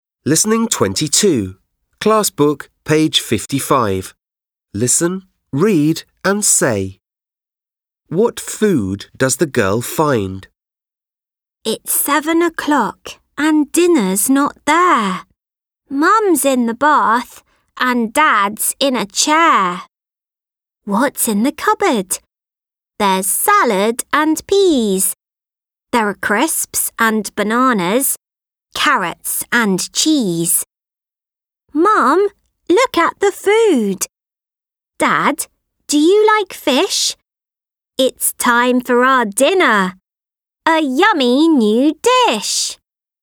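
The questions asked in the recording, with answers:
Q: What food does the girl find?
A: Salad, peas, crisps, bananas, carrots and cheese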